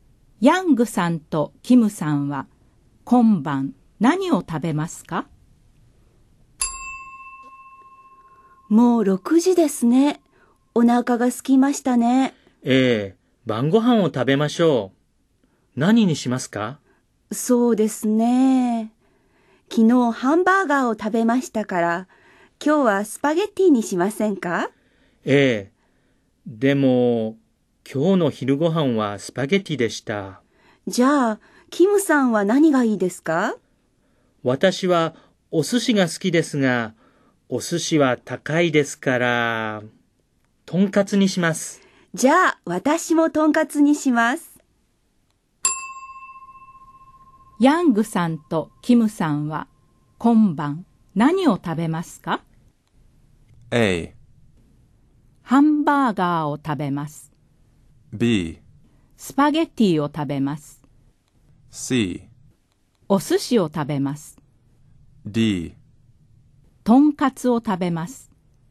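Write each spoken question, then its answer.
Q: ヤングさんとキムさんは今晩何を食べますか?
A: D: とんかつを食べます。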